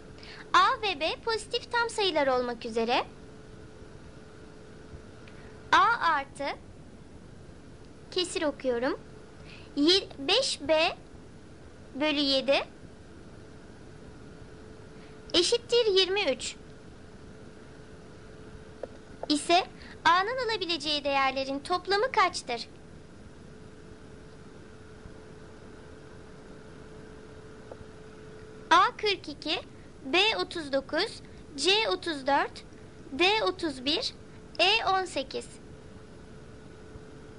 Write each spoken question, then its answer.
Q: ise A'nın alabileceği değerlerin toplamı kaçtır?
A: Doğru cevap A 42.